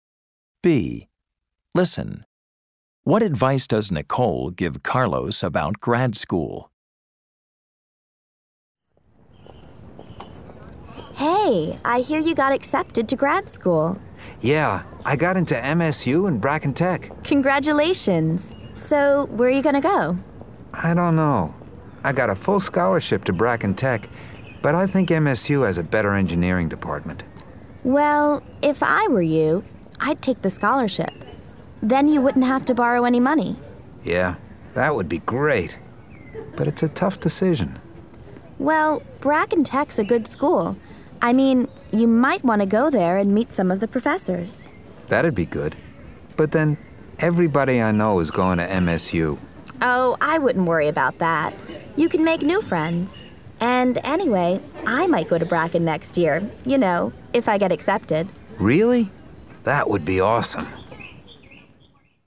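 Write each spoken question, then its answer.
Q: What advice does Nicole give Carlos about grad school?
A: Take the scholarship to Bracken Tech, visit and meet the professors, and don't worry about friends because he can make new ones.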